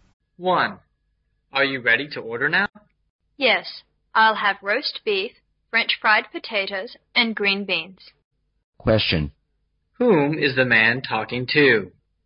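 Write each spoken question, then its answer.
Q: Whom is the man talking to?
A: A waiter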